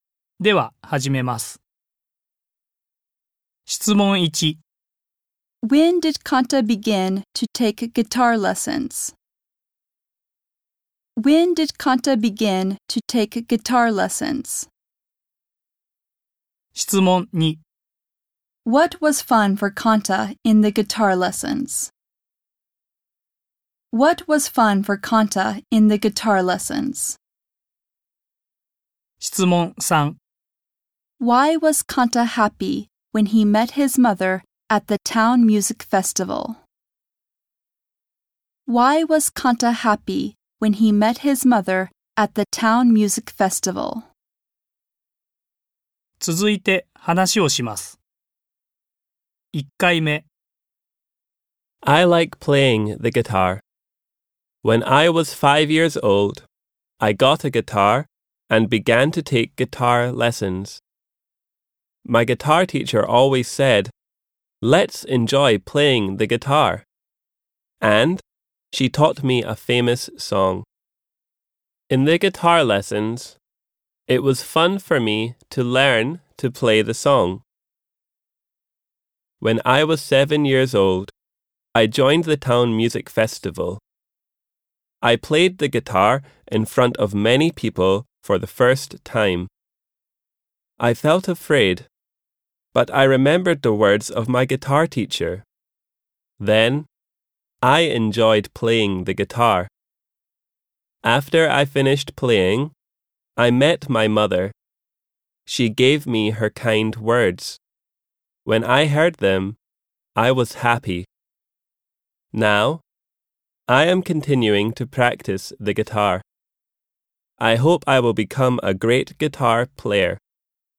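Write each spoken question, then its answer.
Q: When did Kanta begin to take guitar lessons?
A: When he was 5 years old.

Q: What was fun for Kanta in the guitar lessons?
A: Learning to play a famous song.

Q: Why was Kanta happy when he met his mother at the town music festival?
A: Because she gave him her kind words.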